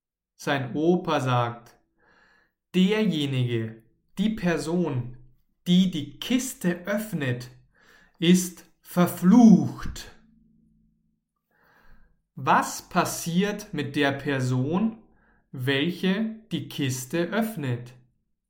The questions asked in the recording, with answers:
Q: Was passiert mit der Person, welche die Kiste öffnet?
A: Sie ist verflucht. Die Person, welche die Kiste öffnet, ist verflucht.